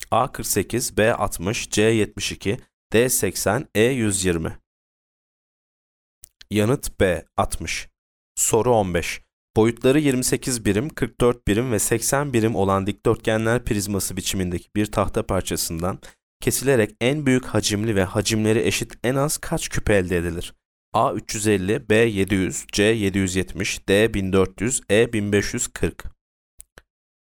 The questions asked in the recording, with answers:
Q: Boyutları 28 birim, 44 birim ve 80 birim olan dikdörtgenler prizması biçimindeki bir tahta parçasından kesilerek en büyük hacimli ve hacimleri eşit en az kaç küp elde edilir?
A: Yanıt E 1540.